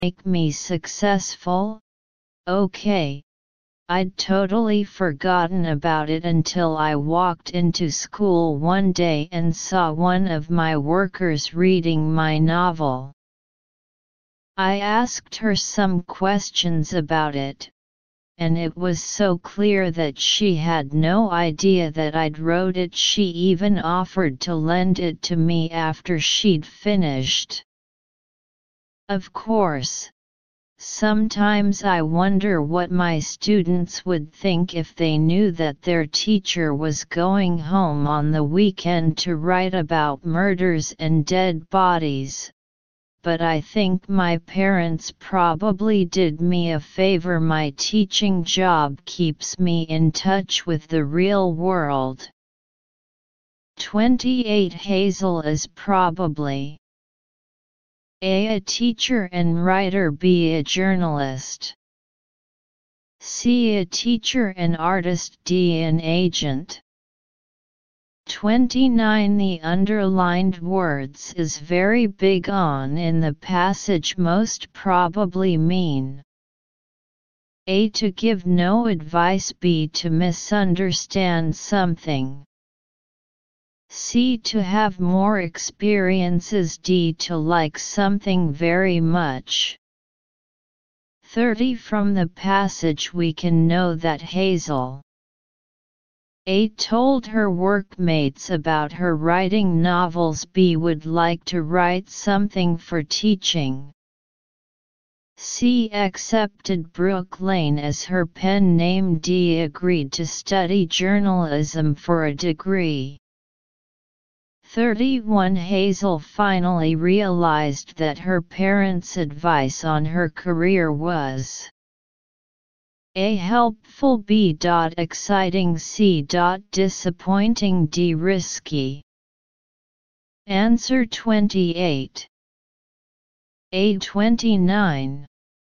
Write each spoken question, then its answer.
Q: Hazel is probably A. A teacher and writer, B. A journalist, C. A teacher and artist, D. An agent.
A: 28. A.

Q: Hazel finally realized that her parents' advice on her career was A. helpful, B. exciting, C. disappointing, D. risky.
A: 31. A.